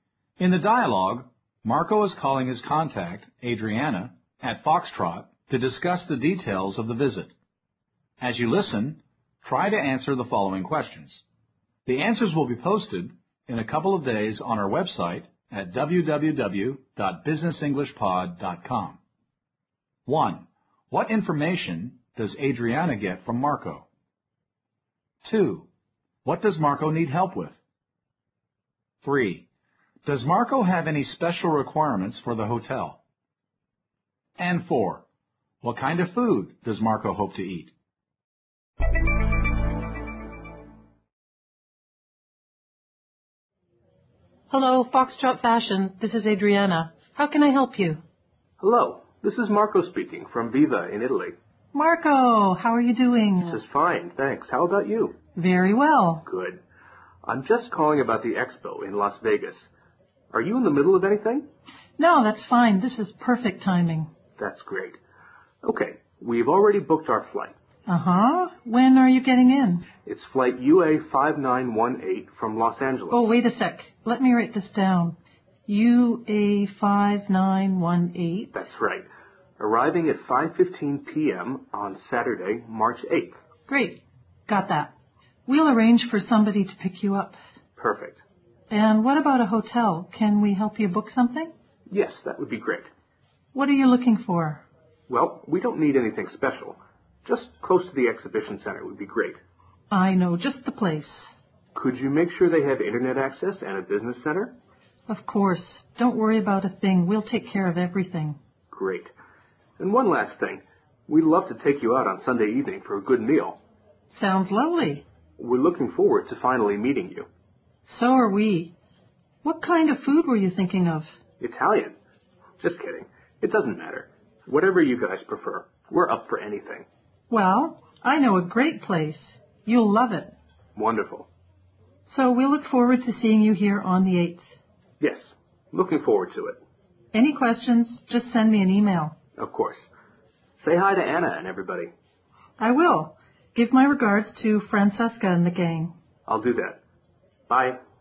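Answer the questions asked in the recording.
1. His flight details: flight UA5918 from Los Angeles, arriving at 5:15 p.m. on Saturday, March 8th
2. Booking a hotel
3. Yes: it should be close to the exhibition center and have internet access and a business center
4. It doesn't matter; he's happy to eat anything (he jokes about Italian)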